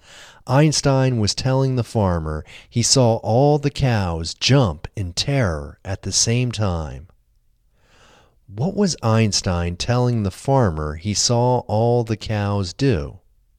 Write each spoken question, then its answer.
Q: What was Einstein telling the farmer he saw all the cows do?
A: Einstein was telling the farmer he saw all the cows jump in terror at the same time.